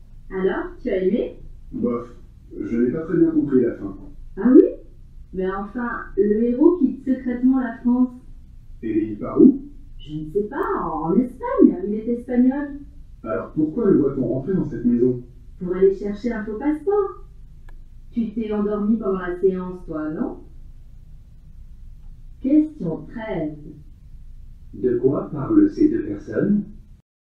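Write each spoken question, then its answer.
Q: De quoi parlent ces deux personnes?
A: D'un film qu'ils ont vu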